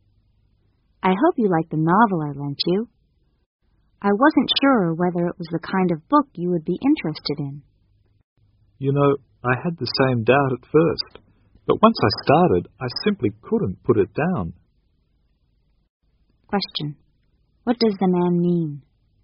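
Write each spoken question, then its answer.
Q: What does the man mean?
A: He found the novel very interesting.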